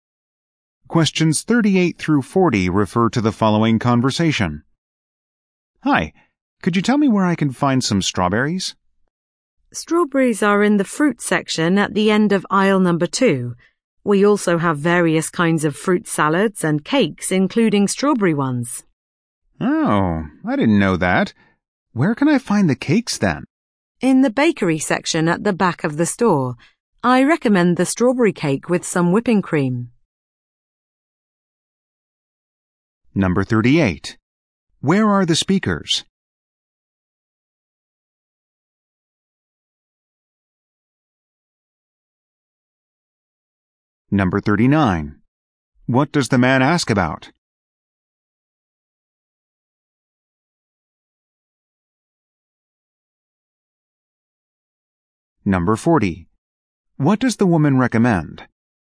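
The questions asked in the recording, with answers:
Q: Where are the speakers?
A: In a grocery store

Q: What does the man ask about?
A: Where to find strawberries

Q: What does the woman recommend?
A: The strawberry cake with whipping cream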